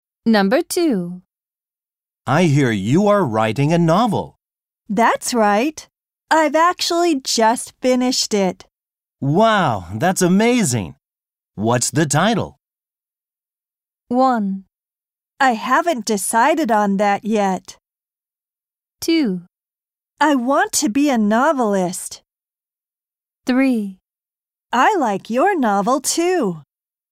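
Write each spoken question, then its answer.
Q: Wow, that's amazing. What's the title?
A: 1: I haven't decided on that yet.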